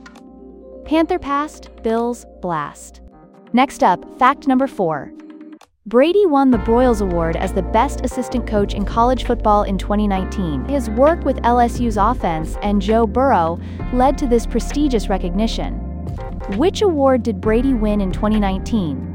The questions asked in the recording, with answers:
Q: Which award did Brady win in 2019?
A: Broyles Award.